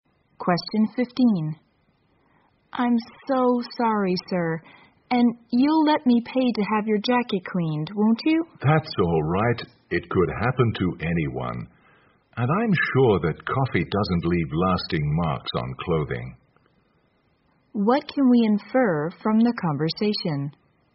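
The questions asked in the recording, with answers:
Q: What can we infer from the conversation?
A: The woman spilled coffee on the man's jacket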